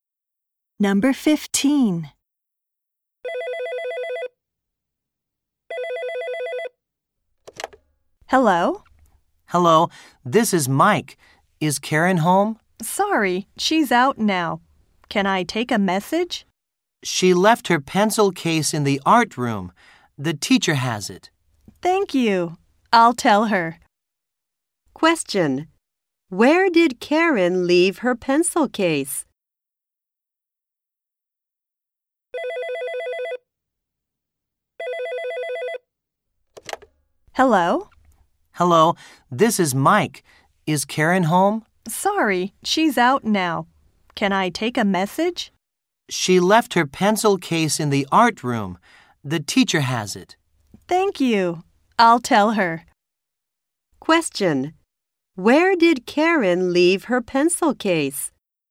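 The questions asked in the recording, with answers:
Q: Where did Karen leave her pencil case?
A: In the art room.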